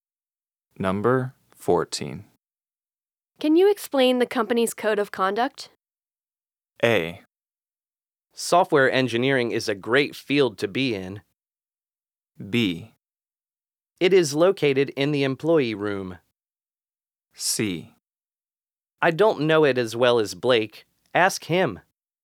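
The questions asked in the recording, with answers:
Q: Can you explain the company's code of conduct?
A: C: I don't know it as well as Blake. Ask him.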